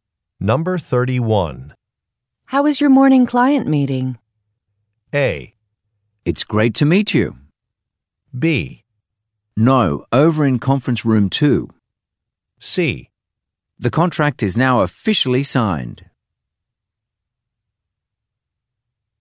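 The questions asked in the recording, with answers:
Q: How is your morning client meeting?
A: C: The contract is now officially signed.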